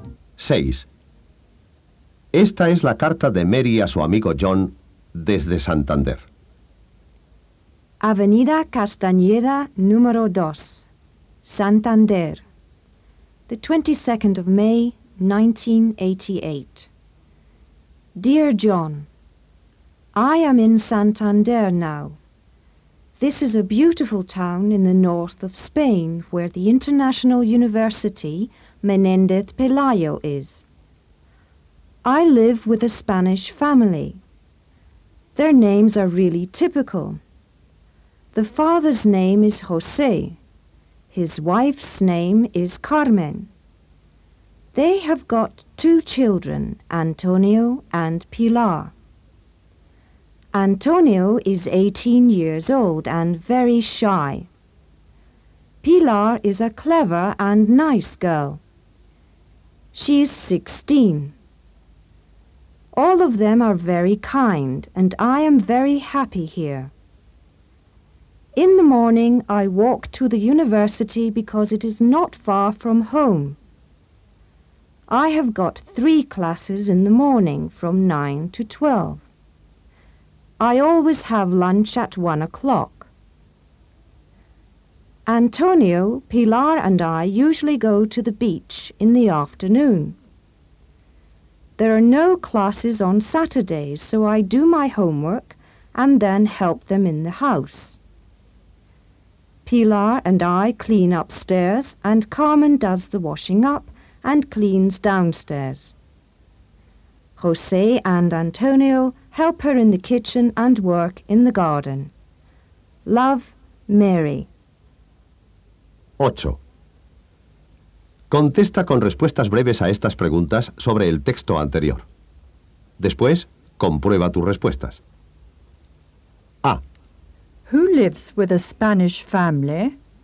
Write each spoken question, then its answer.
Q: Who lives with a Spanish family?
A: Mary does. Mary lives with a Spanish family.